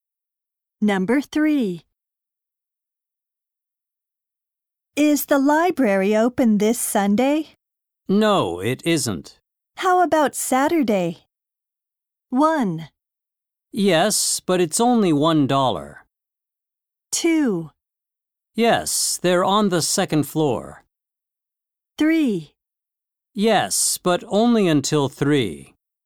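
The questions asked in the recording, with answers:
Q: How about Saturday?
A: 3: Yes, but only until 3.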